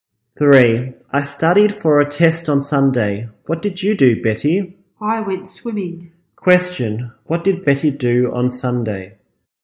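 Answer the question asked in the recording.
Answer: She went swimming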